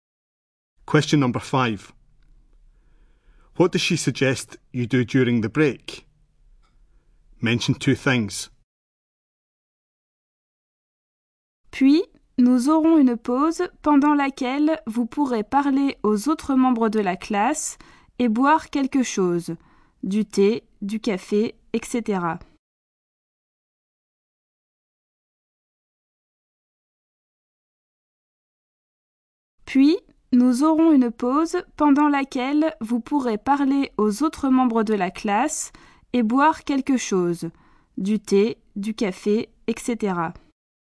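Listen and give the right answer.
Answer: Talk to other class members and have a drink (tea, coffee)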